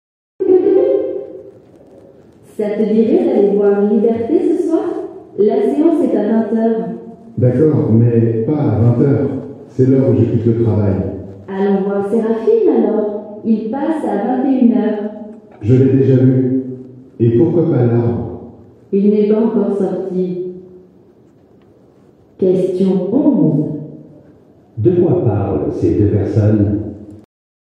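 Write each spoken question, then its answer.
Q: De quoi parlent ces deux personnes ?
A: Du film à aller voir au cinéma ce soir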